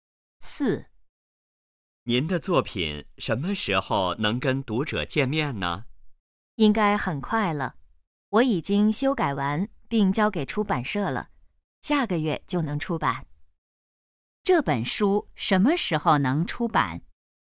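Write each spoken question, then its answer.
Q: 这本书什么时候能出版?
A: 下个月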